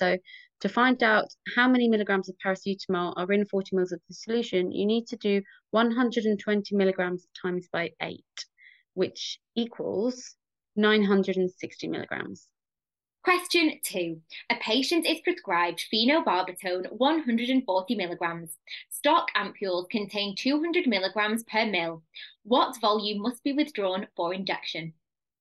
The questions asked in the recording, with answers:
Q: What volume must be withdrawn for injection?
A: 140 divided by 200 is 0.7 mils